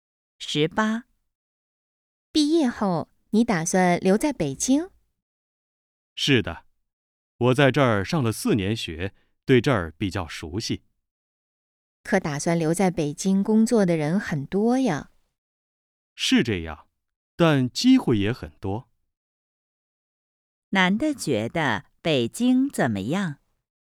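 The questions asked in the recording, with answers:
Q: 男的觉得北京怎么样?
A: 机会很多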